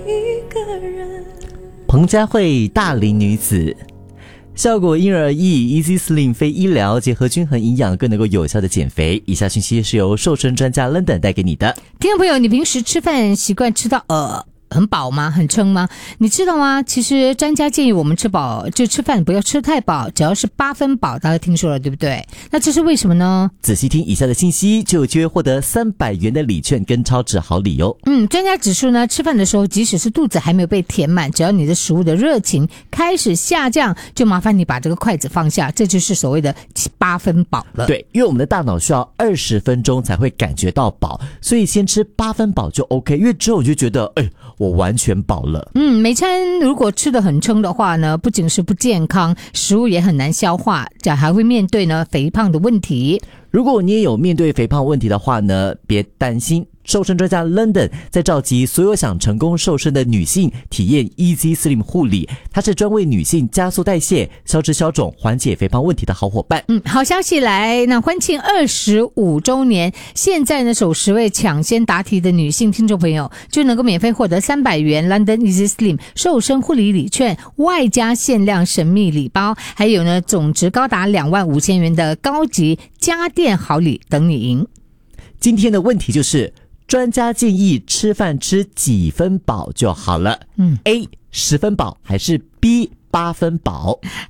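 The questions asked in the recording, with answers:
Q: 专家建议吃饭吃几分饱就好了。A 10分饱还是 B 8分饱?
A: B: 8分饱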